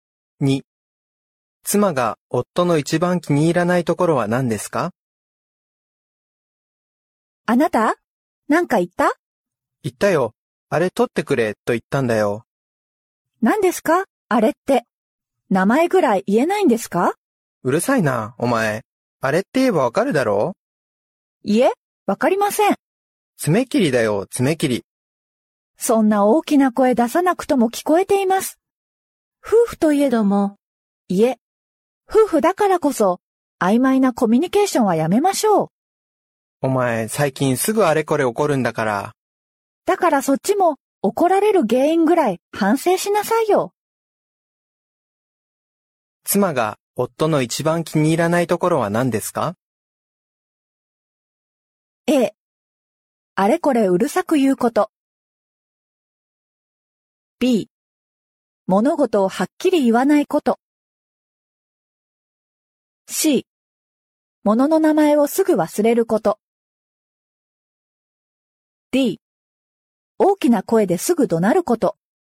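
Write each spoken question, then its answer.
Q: 妻が夫の一番気に入らないところは何ですか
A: B。物事をはっきり言わないこと。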